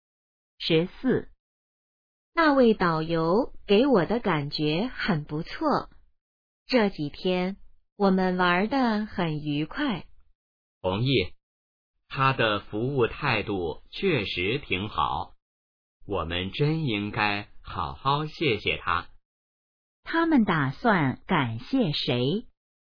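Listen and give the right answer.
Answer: 导游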